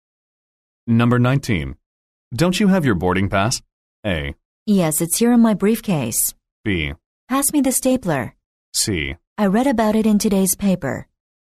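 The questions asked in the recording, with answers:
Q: Don't you have your boarding pass?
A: A: Yes, it's here in my briefcase.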